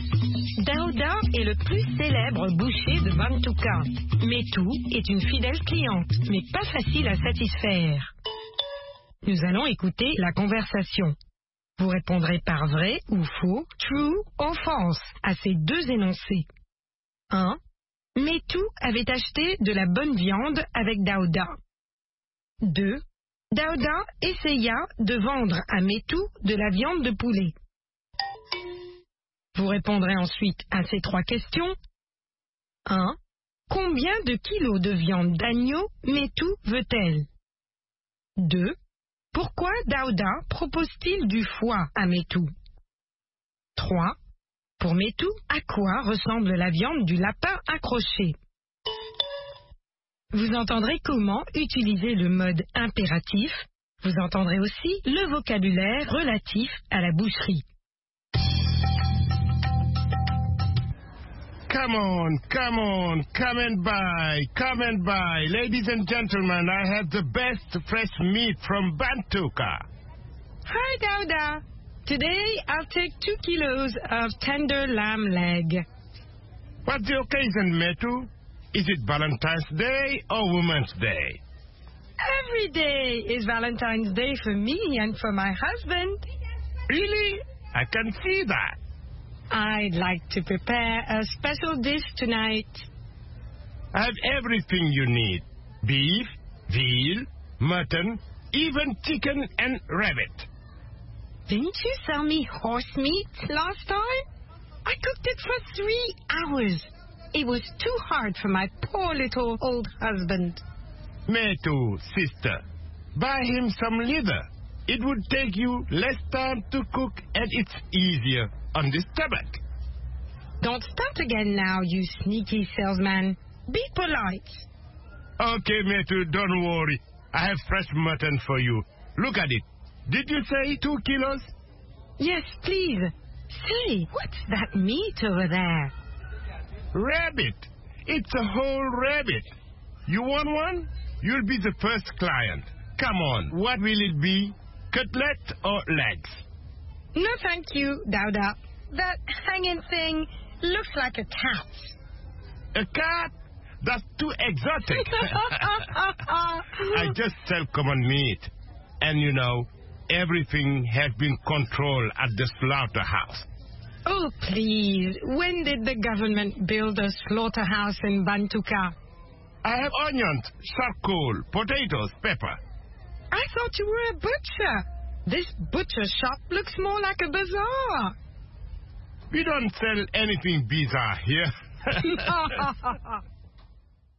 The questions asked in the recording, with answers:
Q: Metou avait acheté de la bonne viande avec Daouda.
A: L'énoncé 1 est faux.

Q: Dauda essaya de vendre à Métou de la viande de poulet.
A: L'énoncé 2 est faux.

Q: Combien de kilos de viande d'agneau Métou veut-elle?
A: 2 kilos.

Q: Pourquoi Dauda propose-t-il du foie à Métou?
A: Ça prend moins de temps à cuire.

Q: Pour Métou, à quoi ressemble la viande du lapin accroché?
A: À un chat.